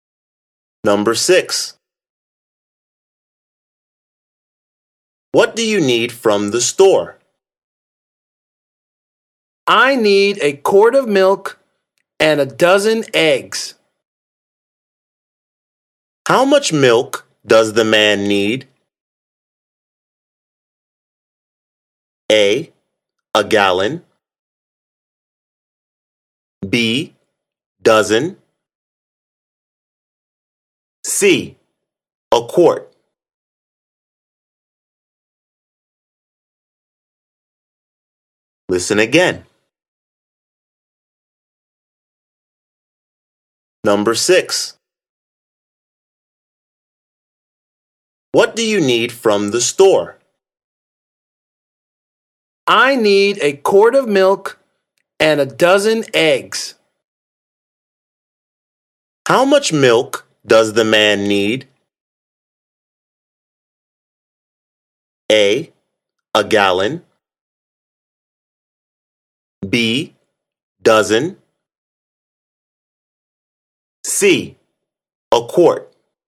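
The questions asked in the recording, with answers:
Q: How much milk does the man need?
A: C: A quart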